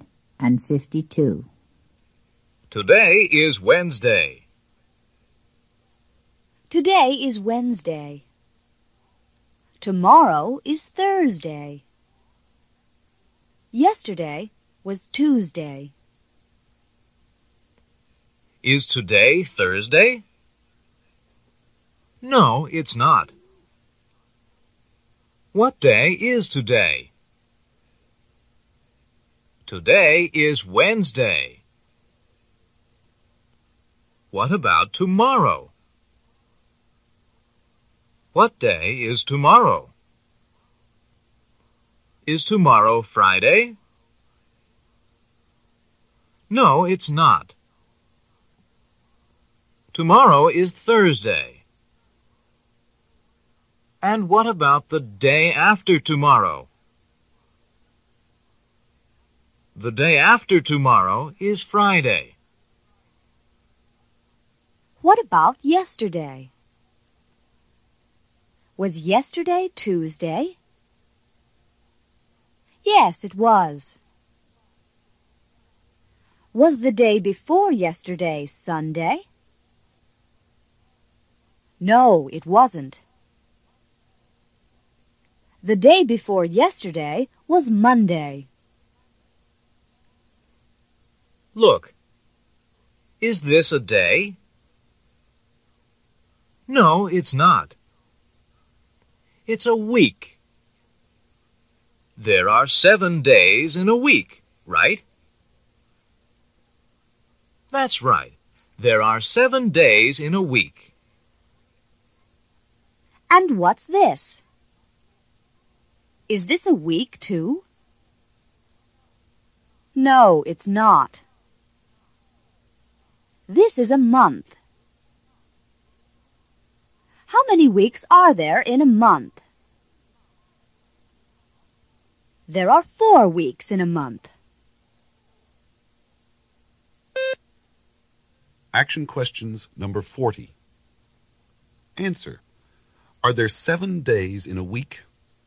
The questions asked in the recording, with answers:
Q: Are there 7 days in a week?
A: Yes, there are.